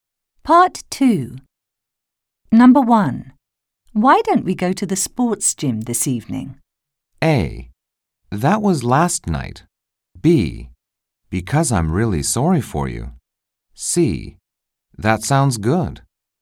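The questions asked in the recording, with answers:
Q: Why don't we go to the sports gym this evening?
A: C: That sounds good.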